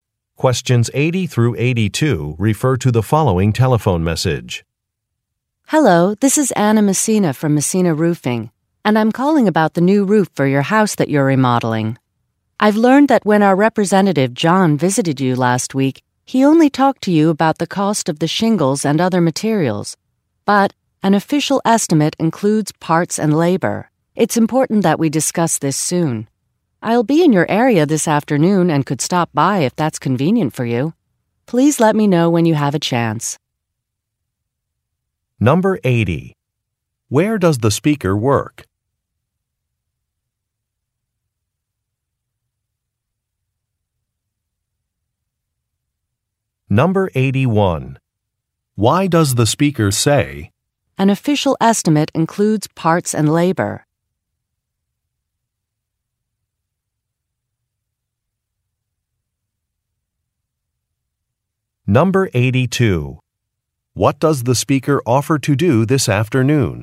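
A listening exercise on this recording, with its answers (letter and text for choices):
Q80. Where does the speaker work?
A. At an architecture firm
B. At an accounting firm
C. At a roofing company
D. At an auto repair shop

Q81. Why does the speaker say, "an official estimate includes parts and labor"?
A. To compare her company to another one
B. To correct a colleague's mistake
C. To complain about an expense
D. To ask for help with a project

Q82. What does the speaker offer to do this afternoon?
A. Visit the listener's home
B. Update the listener's contact information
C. Consult a financial advisor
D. Post a job announcement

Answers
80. C. At a roofing company
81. B. To correct a colleague's mistake
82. A. Visit the listener's home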